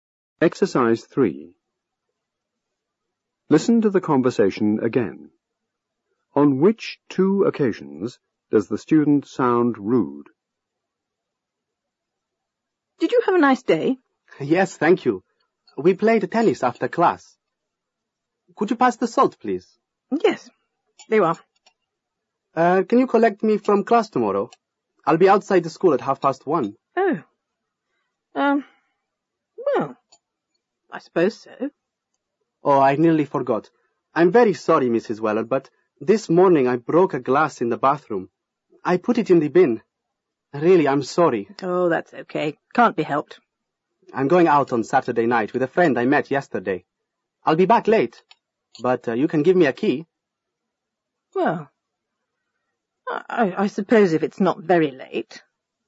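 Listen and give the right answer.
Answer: When asking to be collected from class tomorrow, and when saying she'll be back late and asking for a key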